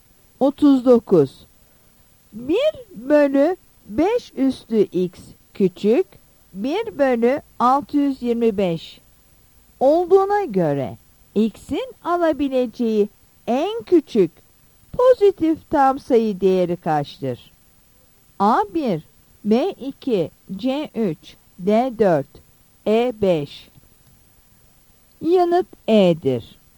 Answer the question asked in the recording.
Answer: Yanıt E'dir.